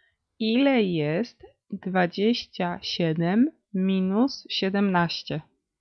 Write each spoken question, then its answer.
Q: Ile jest 27 minus 17?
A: 10.